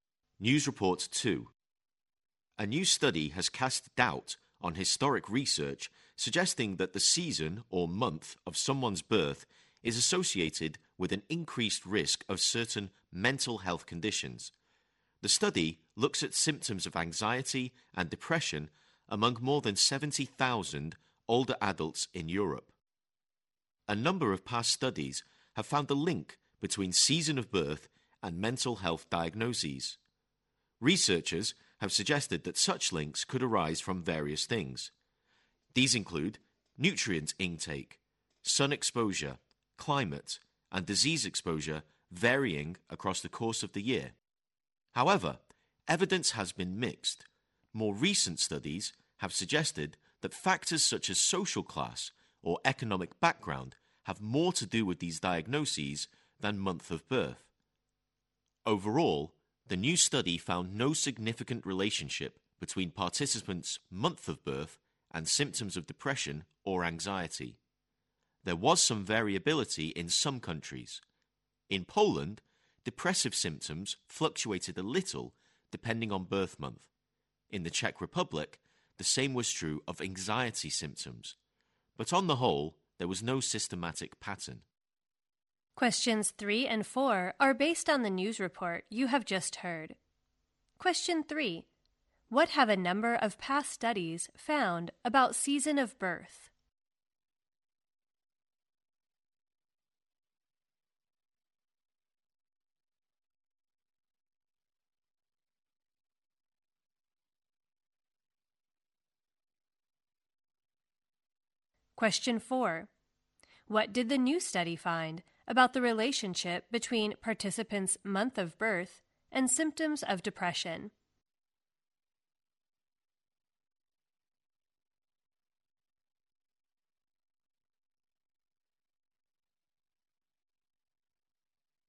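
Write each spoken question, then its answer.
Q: What have a number of past studies found about season of birth?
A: It is linked to mental health diagnoses

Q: What did the new study find about the relationship between participants' month of birth and symptoms of depression?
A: No significant relationship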